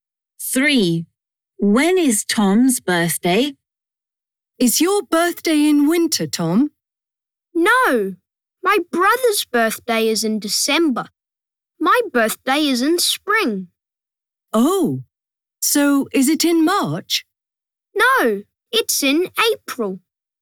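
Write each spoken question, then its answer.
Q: When is Tom's birthday?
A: In April.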